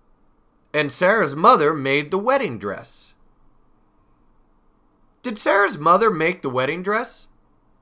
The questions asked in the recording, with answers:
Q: Did Sarah's mother make the wedding dress?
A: Yes, she did. Sarah's mother made the wedding dress.